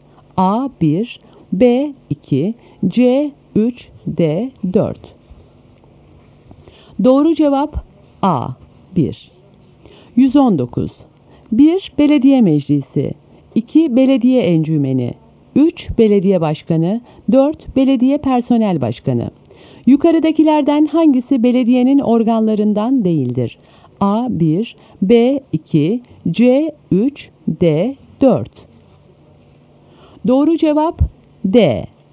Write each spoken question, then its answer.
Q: Yukarıdakilerden hangisi belediyenin organlarından değildir?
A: Doğru cevap D.